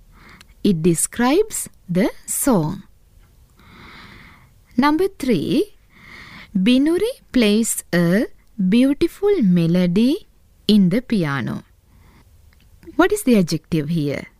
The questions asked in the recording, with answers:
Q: What is the adjective here?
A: Yes, beautiful is the adjective.